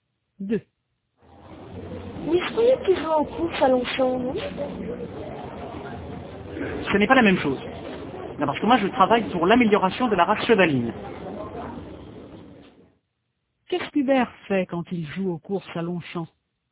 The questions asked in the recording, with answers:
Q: Qu'est-ce qu'Hubert fait quand il joue aux courses à Longchamp ?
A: Il travaille pour l'amélioration de la race chevaline.